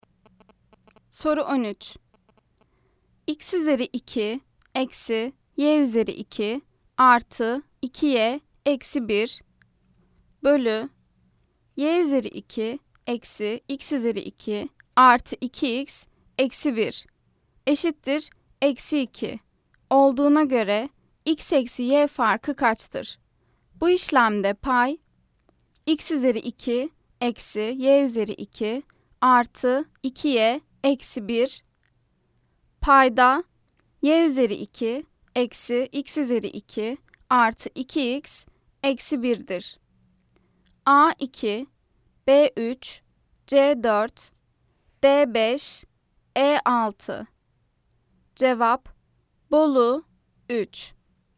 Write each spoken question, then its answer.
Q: X üzeri 2 eksi y üzeri 2 artı 2y eksi 1 bölü y üzeri 2 eksi x üzeri 2 artı 2x eksi 1 eşittir eksi 2 olduğuna göre x eksi y farkı kaçtır?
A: Cevap Bolu 3.